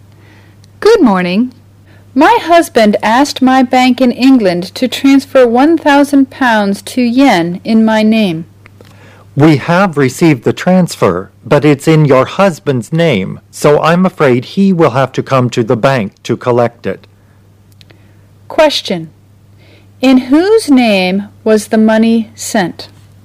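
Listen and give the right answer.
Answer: Her husband's name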